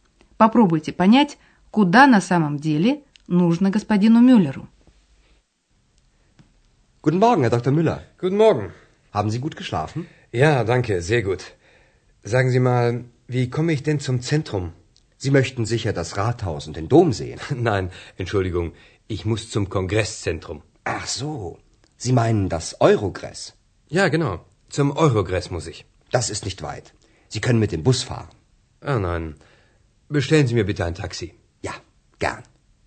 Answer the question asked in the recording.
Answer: Господин Мюллер хочет попасть не в центр города, а в Ахенский конгресс-центр, который называют Еврогресс.